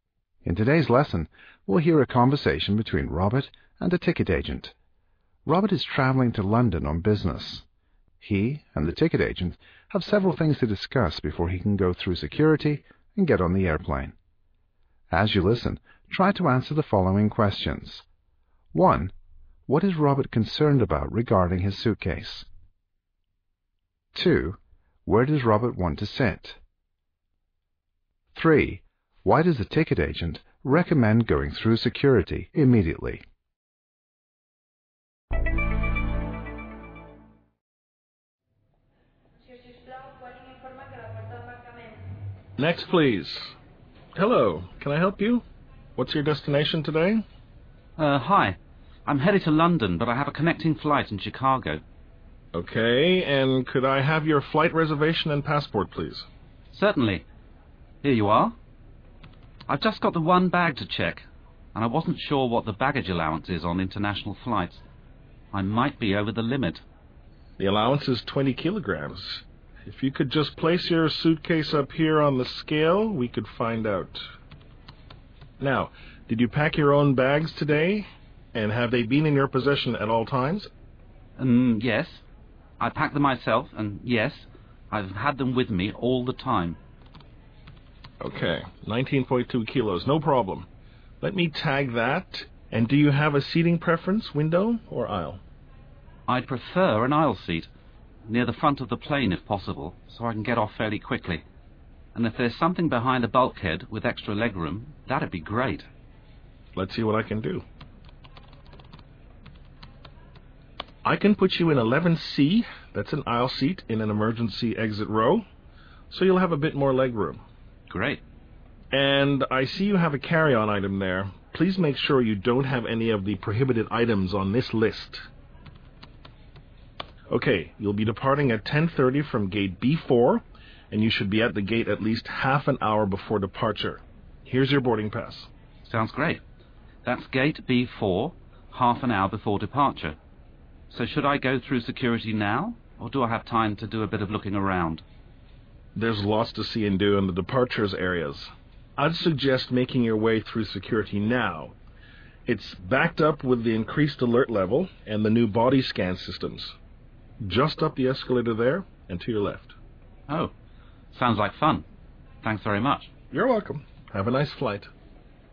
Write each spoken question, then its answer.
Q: What is Robert concerned about regarding his suitcase?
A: He worries that his suitcase might be too heavy.

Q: Where does Robert want to sit?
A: He wants one near the front, and if possible, behind the bulkhead.

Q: Why does the ticket agent recommend going through security immediately?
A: The agent explains that security is busy and slow, or backed up.